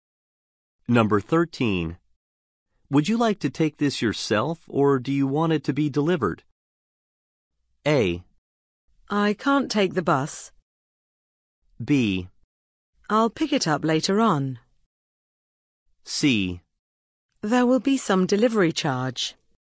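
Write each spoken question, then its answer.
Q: Would you like to take this yourself, or do you want it to be delivered?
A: B: I'll pick it up later on.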